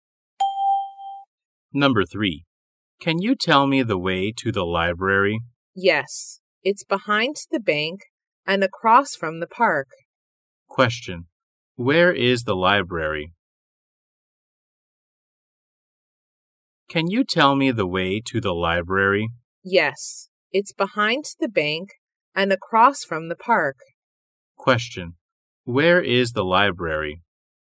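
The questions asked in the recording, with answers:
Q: Where is the library?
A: Behind the bank and across from the park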